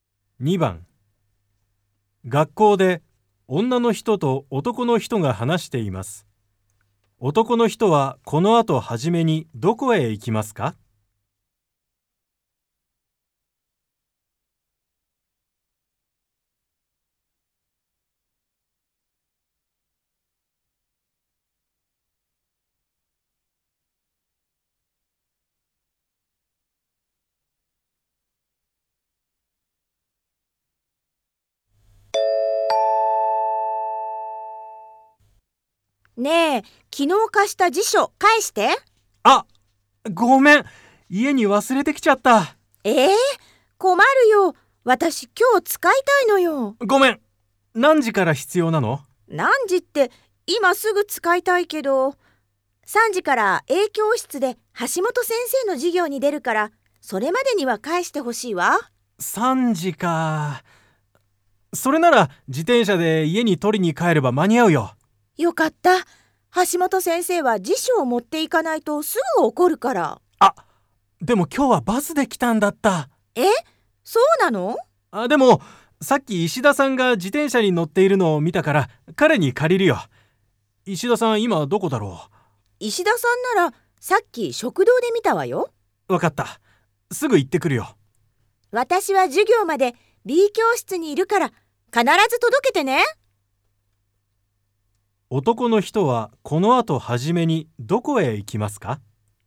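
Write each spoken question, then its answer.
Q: 男の人はこの後はじめにどこへ行きますか?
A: 食堂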